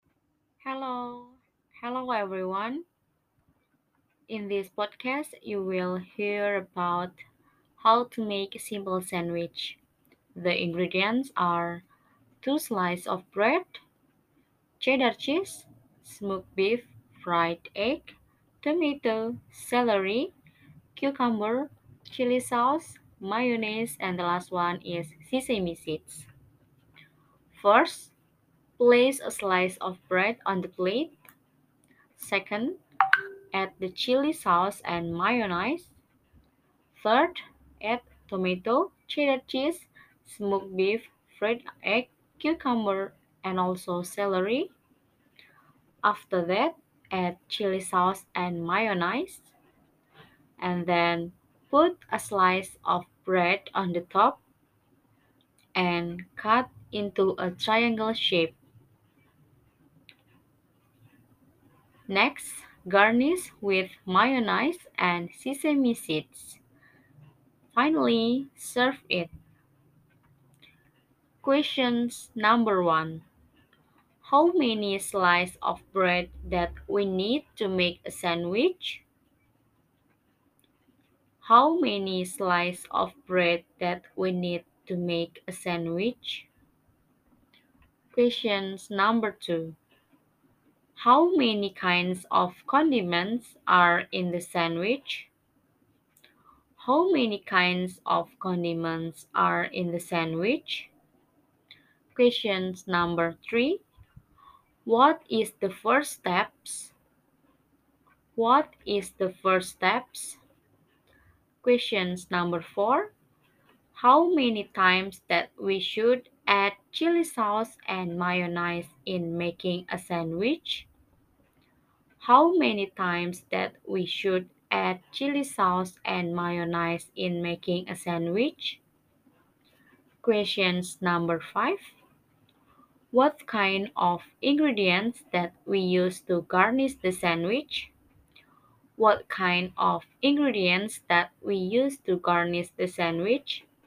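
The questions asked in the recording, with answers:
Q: How many slices of bread that we need to make a sandwich?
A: Two slices

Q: What is the first steps?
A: Place a slice of bread on the plate

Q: How many times that we should add chili sauce and mayonnaise in making a sandwich?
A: Twice

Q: What kind of ingredients that we use to garnish the sandwich?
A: Mayonnaise and sesame seeds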